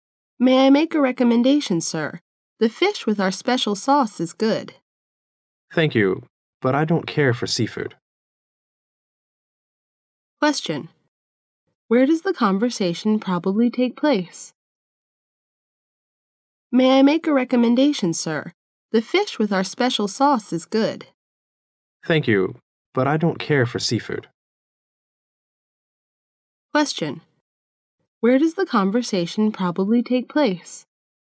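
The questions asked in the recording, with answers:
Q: Where does the conversation probably take place?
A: In a restaurant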